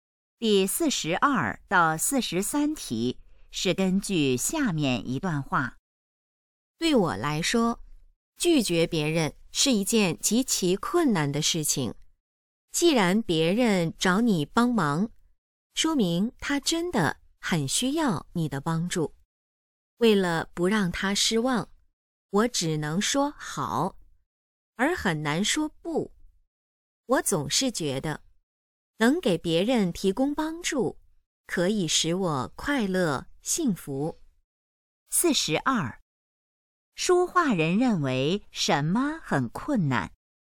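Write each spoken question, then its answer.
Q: 说话人认为什么很困难?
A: 拒绝别人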